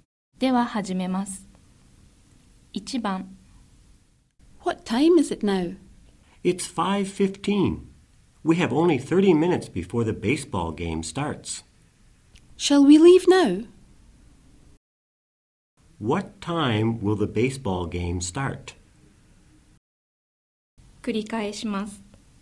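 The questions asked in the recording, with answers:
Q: What time will the baseball game start?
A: At 5:45.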